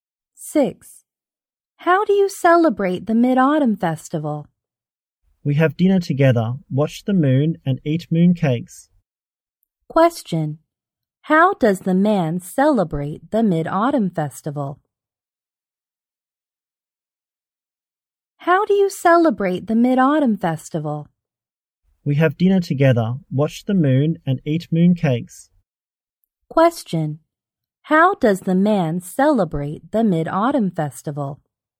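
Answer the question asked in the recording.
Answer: Has dinner together, watches the moon and eats mooncakes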